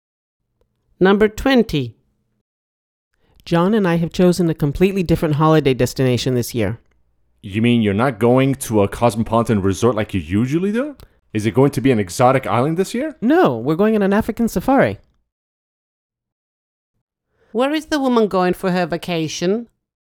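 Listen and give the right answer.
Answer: on an African safari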